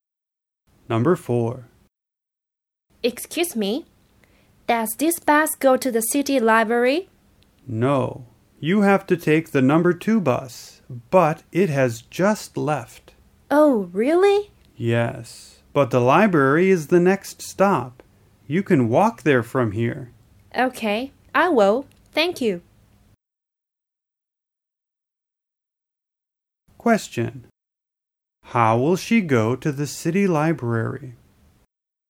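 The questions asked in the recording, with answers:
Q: How will she go to the city library?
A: She will walk there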